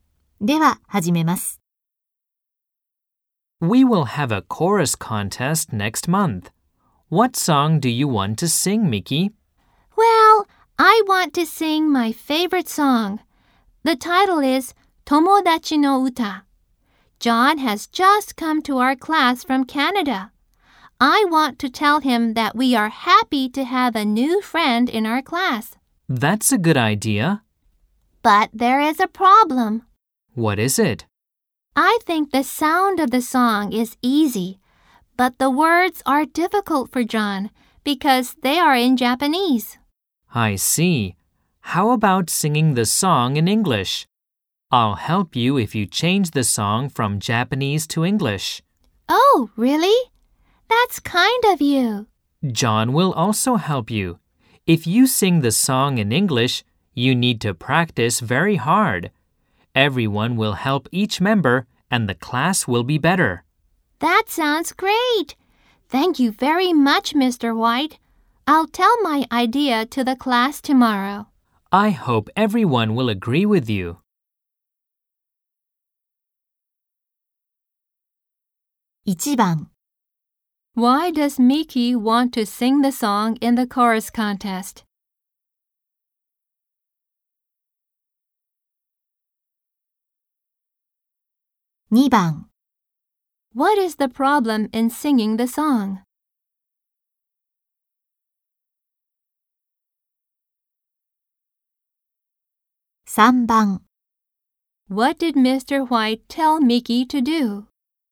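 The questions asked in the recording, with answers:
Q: Why does Miki want to sing the song in the chorus contest?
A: To tell John that they are happy to have a new friend in their class

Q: What is the problem in singing the song?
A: The words are in Japanese, so they are difficult for John

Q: What did Mr. White tell Miki to do?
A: To sing the song in English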